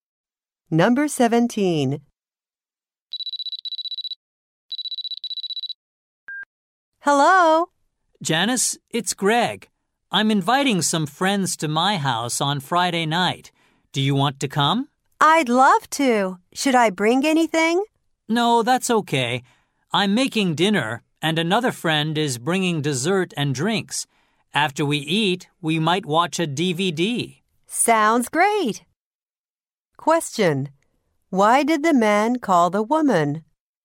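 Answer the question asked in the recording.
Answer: To invite her to his house on Friday night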